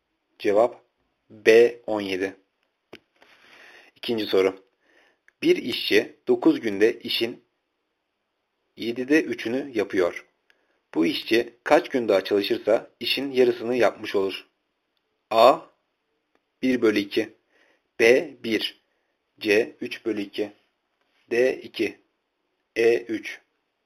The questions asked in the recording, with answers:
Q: Bu işçi kaç gün daha çalışırsa işin yarısını yapmış olur?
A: Cevap C 3 bölü 2.